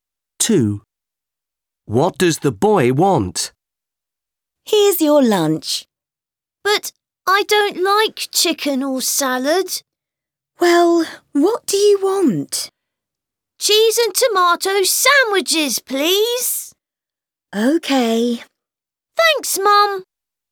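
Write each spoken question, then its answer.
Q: What does the boy want?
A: Cheese and tomato sandwiches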